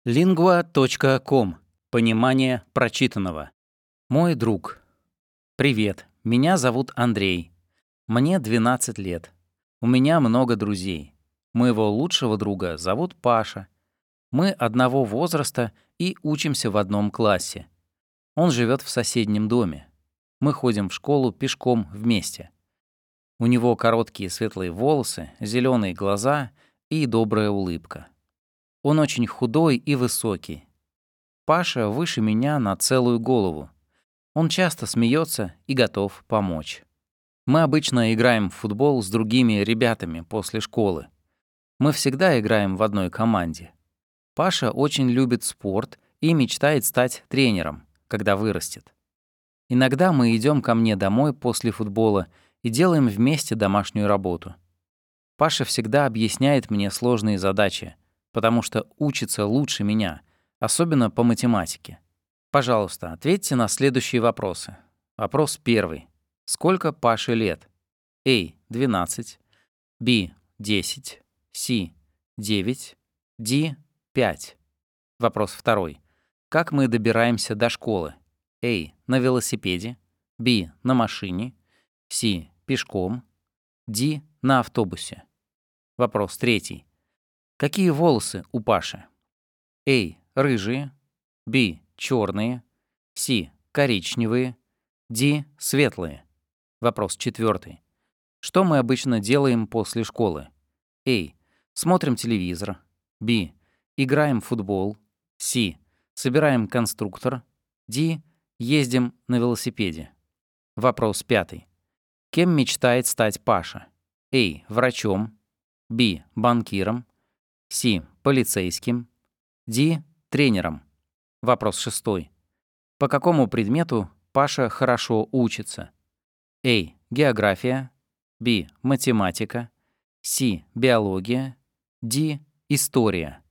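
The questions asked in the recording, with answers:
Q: Сколько Паше лет?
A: A: 12

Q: Как мы добираемся до школы?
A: C: Пешком

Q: Какие волосы у Паши?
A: D: Светлые

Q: Что мы обычно делаем после школы?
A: B: Играем в футбол

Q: Кем мечтает стать Паша?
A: D: Тренером

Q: По какому предмету Паша хорошо учится?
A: B: Математика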